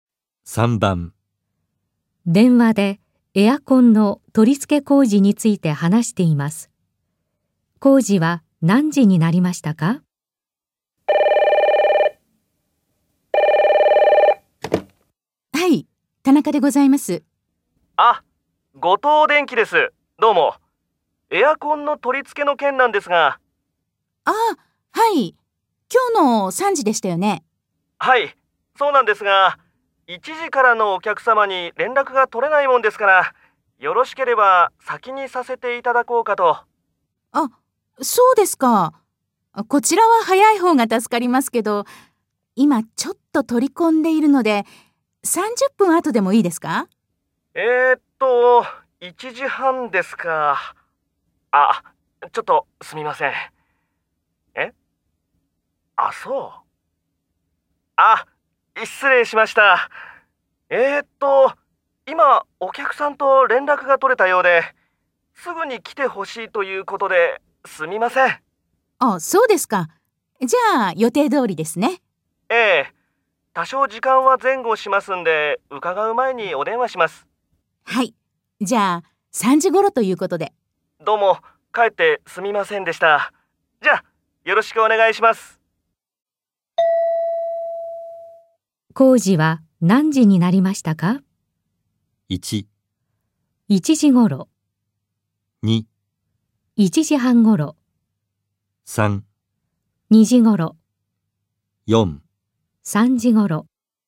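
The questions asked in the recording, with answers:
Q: 工事は何時になりましたか?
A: 4: 3時ごろ。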